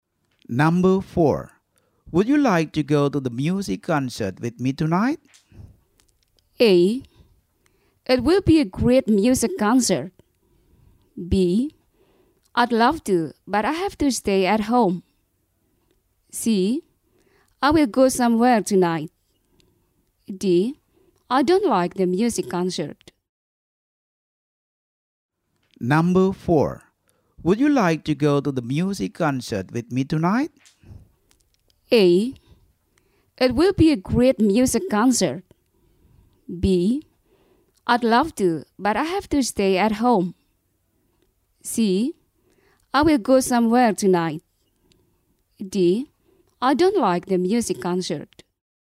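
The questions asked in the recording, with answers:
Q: Would you like to go to the music concert with me tonight?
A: B: I'd love to, but I have to stay at home.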